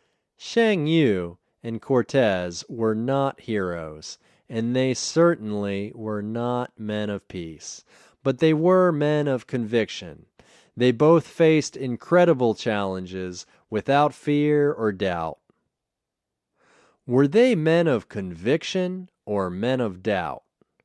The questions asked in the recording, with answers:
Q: Were they men of conviction or men of doubt?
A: They were men of conviction.